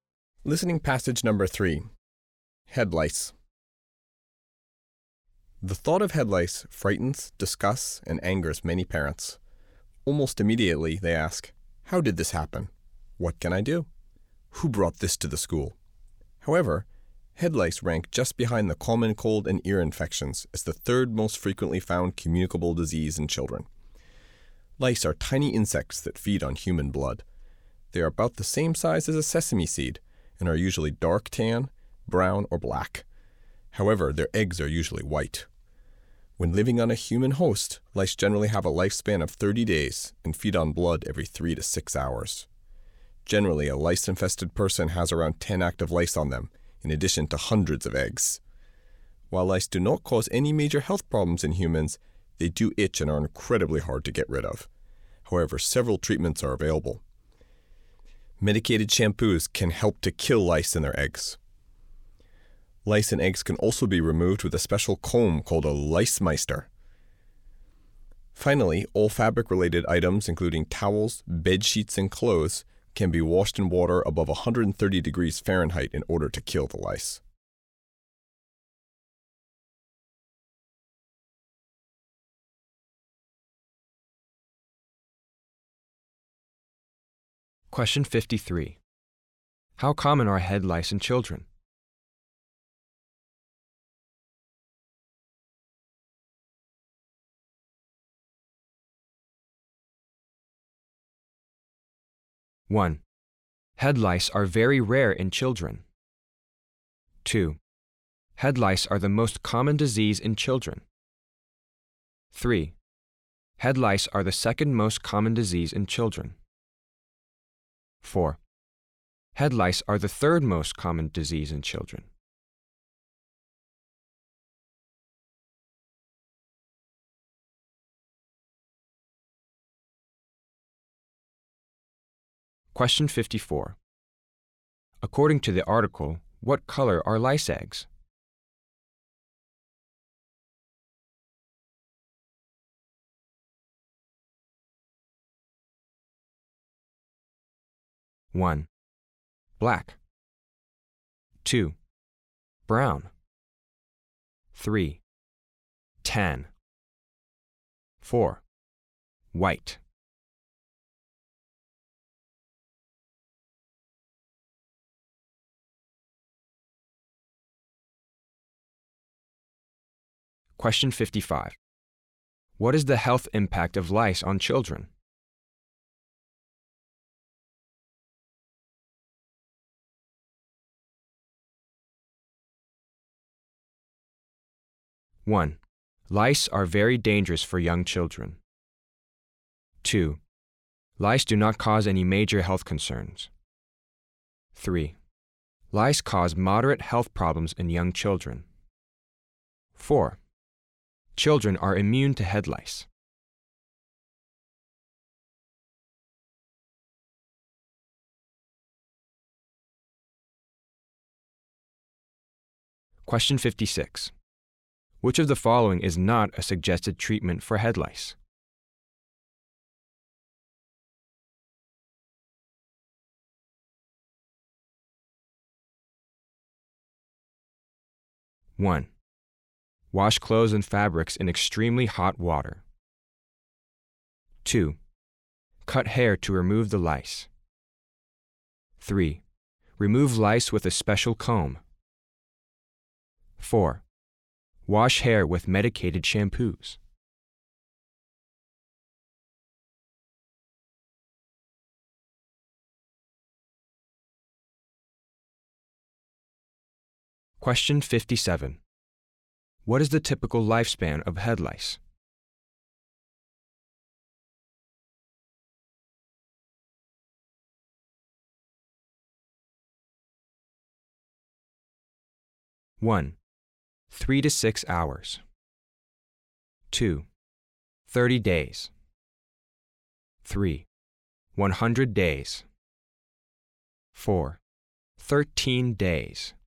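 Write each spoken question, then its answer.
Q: How common are head lice in children?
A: 4: Head lice are the third most common disease in children.

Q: According to the article, what color are lice eggs?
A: 4: White.

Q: What is the health impact of lice on children?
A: 2: Lice do not cause any major health concerns.

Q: Which of the following is not a suggested treatment for head lice?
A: 2: Cut hair to remove the lice.

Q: What is the typical lifespan of head lice?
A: 2: 30 days.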